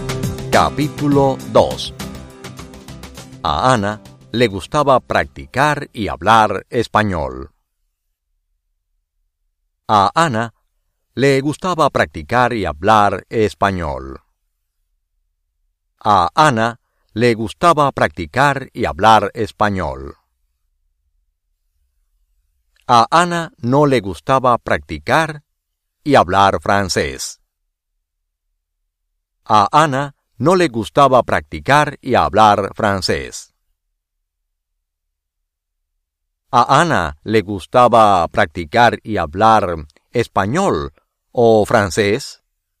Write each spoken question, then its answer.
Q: ¿A Ana le gustaba practicar y hablar español o francés?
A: El español.